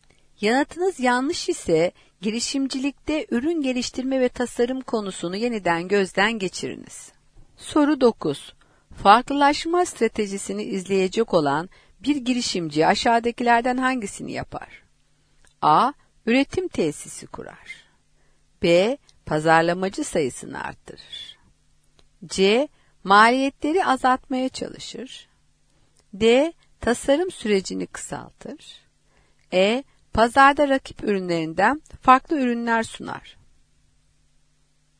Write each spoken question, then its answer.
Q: Farklılaşma stratejisini izleyecek olan bir girişimci aşağıdakilerden hangisini yapar?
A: Doğru cevap E şıkkı, pazarda rakip ürünlerinden farklı ürünler sunar.